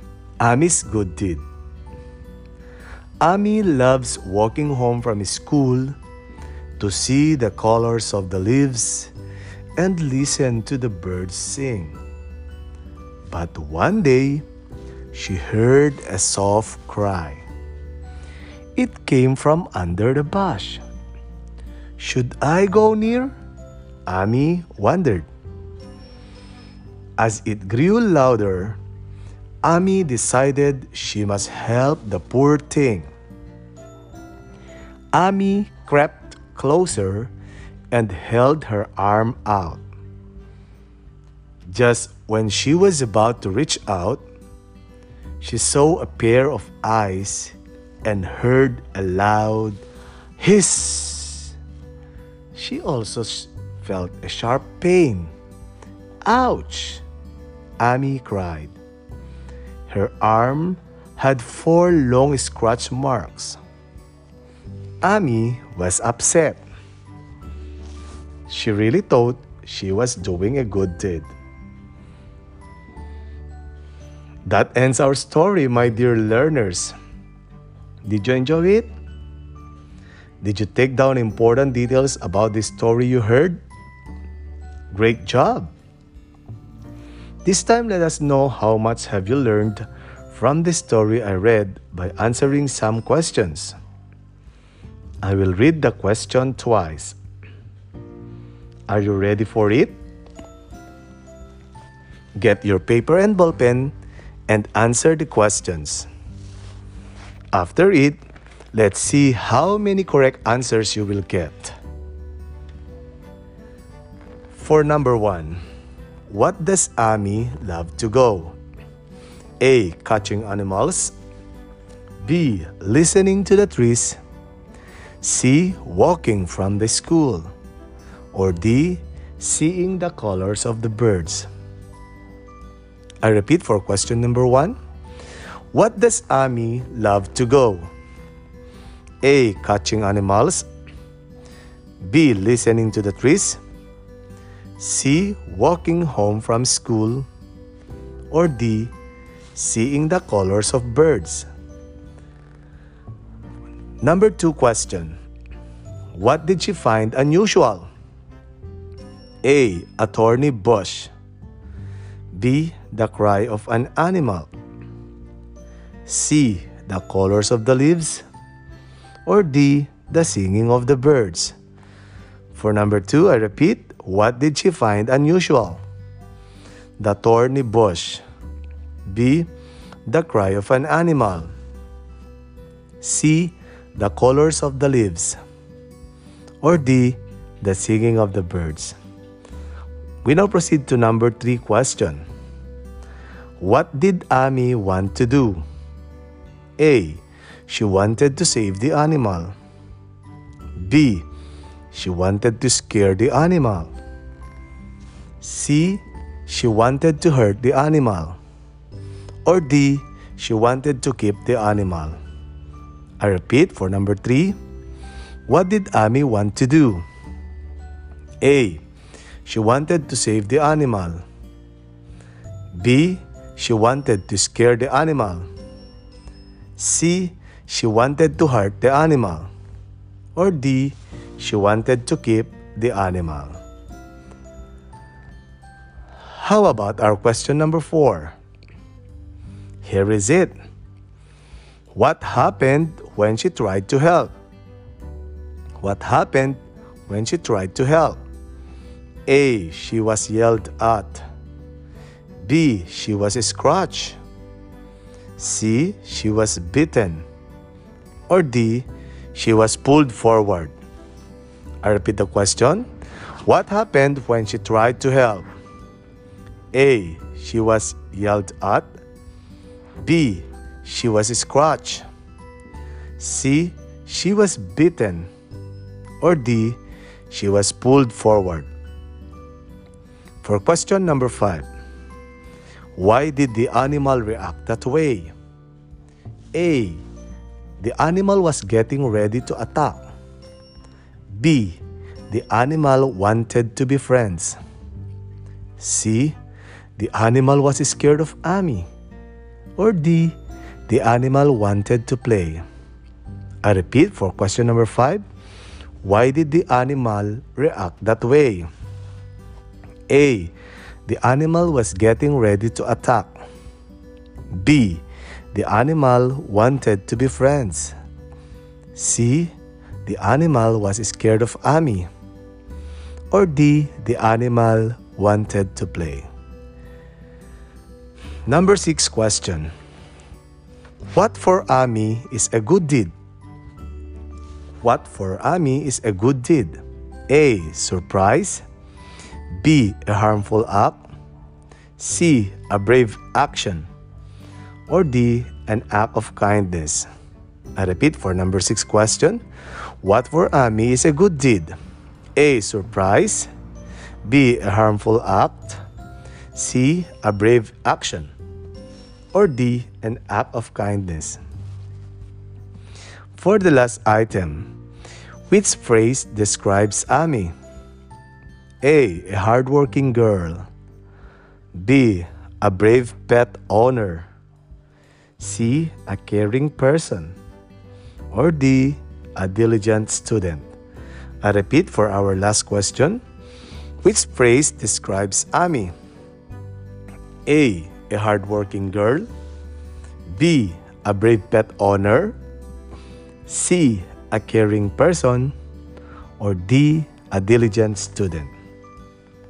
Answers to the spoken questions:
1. For question number one, the correct answer is letter C.
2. For number two, letter B.
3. Number three, the correct answer is letter A.
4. Number four, the answer is letter B.
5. Number five, the right answer is letter C.
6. Number six, the answer is letter D.
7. And for the last number, the answer is letter C.